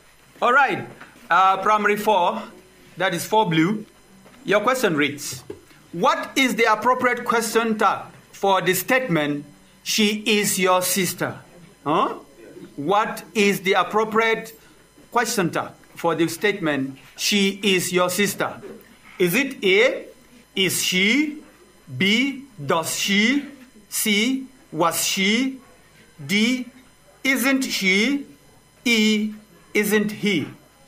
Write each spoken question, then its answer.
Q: what is the appropriate question tag for the statement, she is your sister?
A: D, isn't she?